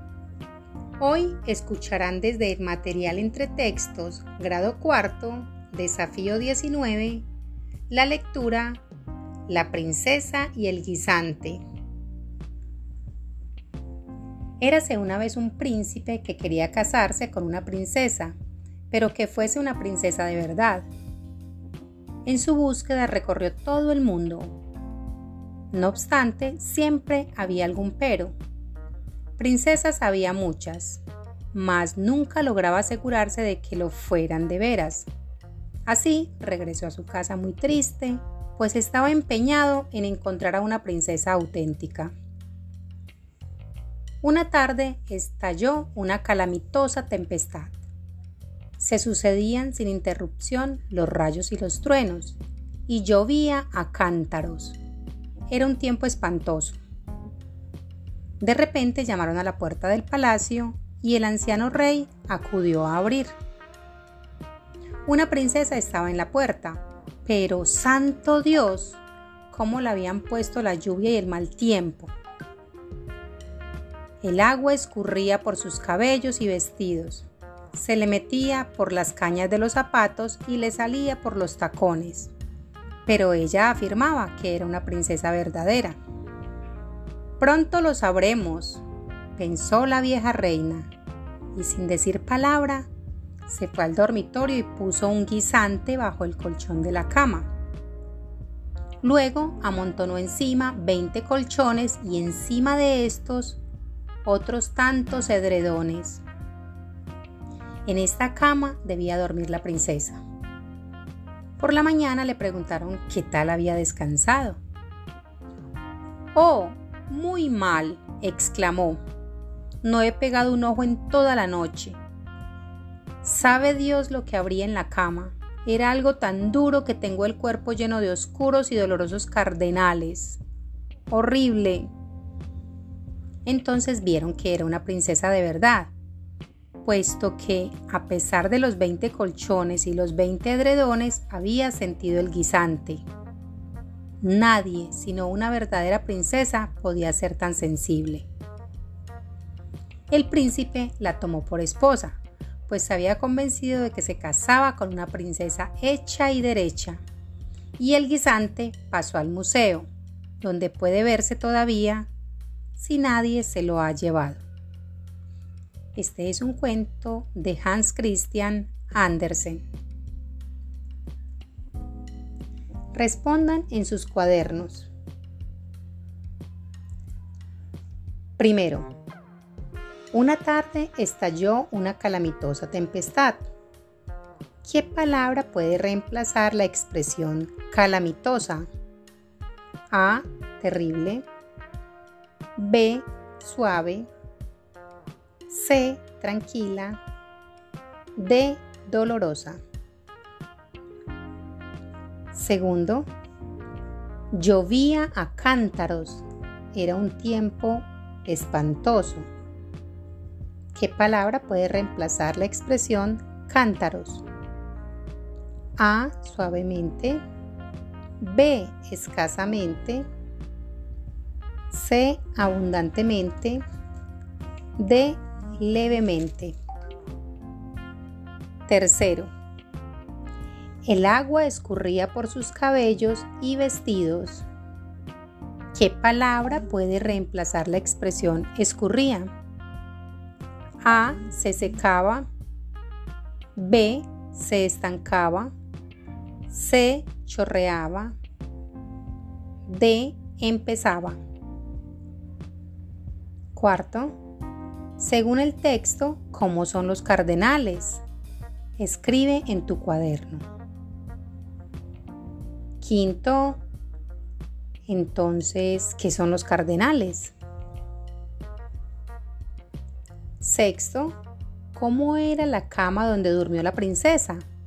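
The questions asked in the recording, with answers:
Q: ¿Qué palabra puede reemplazar la expresión calamitosa?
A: A: Terrible

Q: ¿Qué palabra puede reemplazar la expresión cántaros?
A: C: Abundantemente

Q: ¿Qué palabra puede reemplazar la expresión escurría?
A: C: Chorreaba

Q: según el texto cómo son los cardenales.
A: Oscuros y dolorosos

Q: ¿cómo era la cama donde durmió la princesa?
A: Tenía un guisante bajo el colchón y encima 20 colchones y 20 edredones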